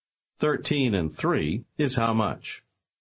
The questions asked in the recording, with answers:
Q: 13 and 3 is how much?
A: 16.